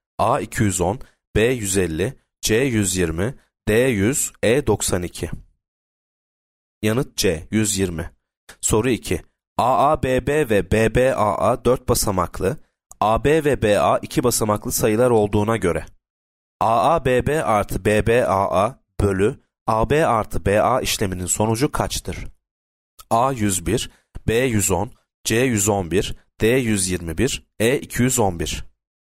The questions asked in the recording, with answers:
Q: AABB artı BBAA bölü AB artı BA işleminin sonucu kaçtır?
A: Yanıt A 101.